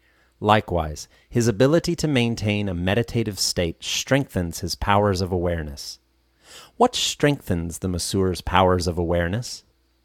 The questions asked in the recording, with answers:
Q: What strengthens the masseur's powers of awareness?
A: His ability to maintain a meditative state during the massage strengthens his powers of awareness.